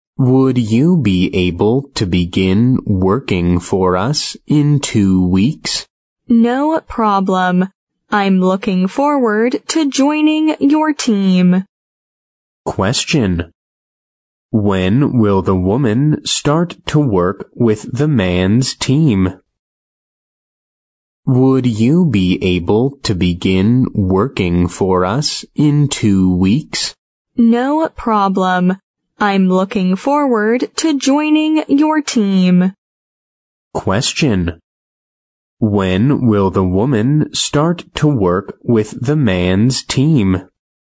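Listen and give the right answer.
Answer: In 2 weeks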